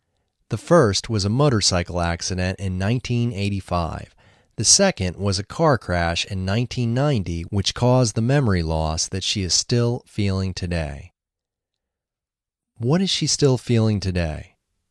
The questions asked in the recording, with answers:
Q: What is she still feeling today?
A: She is still feeling the memory loss.